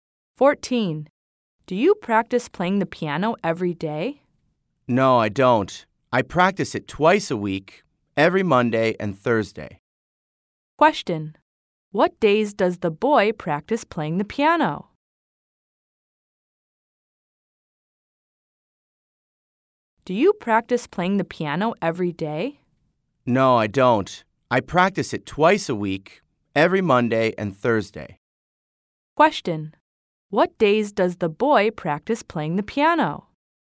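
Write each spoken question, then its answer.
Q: What days does the boy practice playing the piano?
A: Monday and Thursday.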